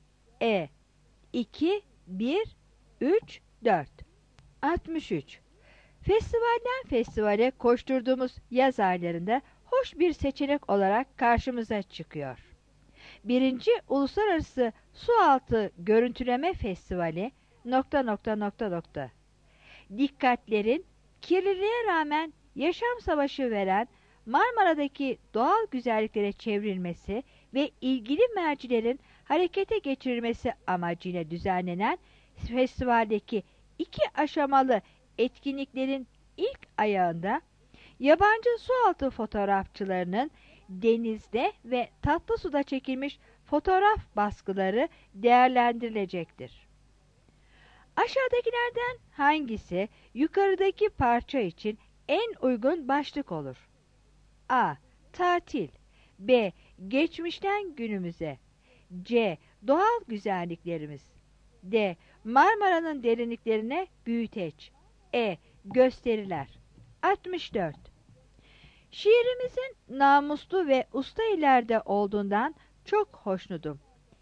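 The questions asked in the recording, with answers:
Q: Aşağıdakilerden hangisi yukarıdaki parça için en uygun başlık olur?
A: D: Marmara'nın derinliklerine büyüteç.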